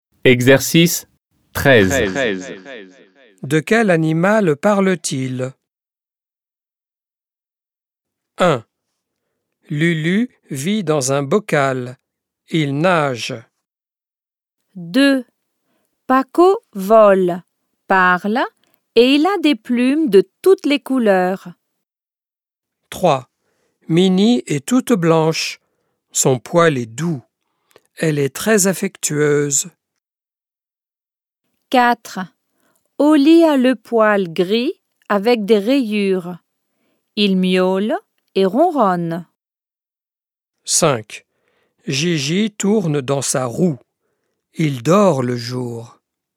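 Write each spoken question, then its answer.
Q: De quel animal parle-t-il?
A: un poisson

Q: De quel animal parle-t-il?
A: un perroquet

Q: De quel animal parle-t-il?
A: un chat

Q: De quel animal parle-t-il?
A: un hamster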